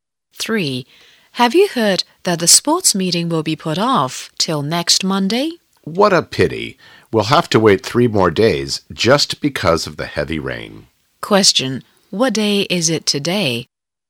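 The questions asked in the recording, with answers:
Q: What day is it today?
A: Friday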